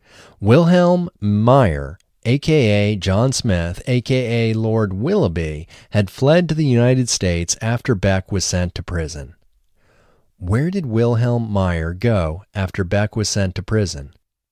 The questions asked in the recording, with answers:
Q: Where did Wilhelm Meyer go after Beck was sent to prison?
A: Wilhelm Meyer went to the United States after Beck was sent to prison.